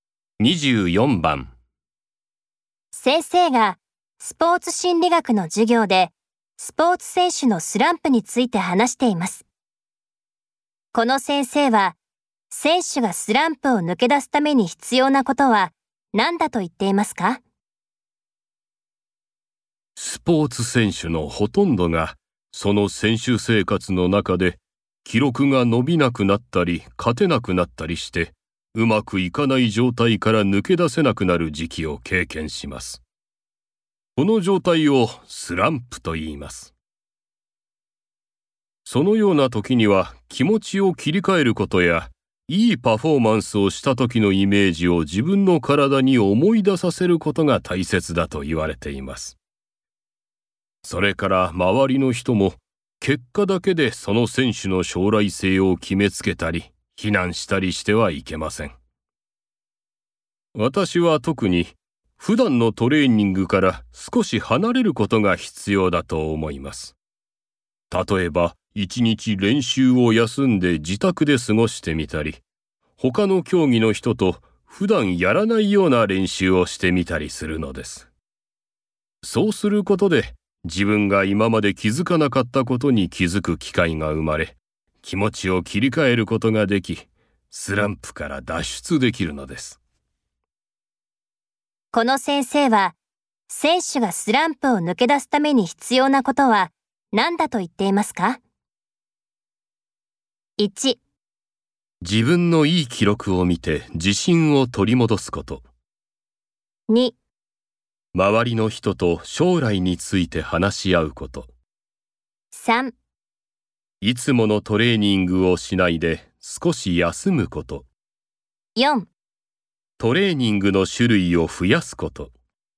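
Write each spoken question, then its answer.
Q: この先生は選手がスランプを抜け出すために必要なことは何だと言っていますか?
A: 3: いつものトレーニングをしないで少し休むこと。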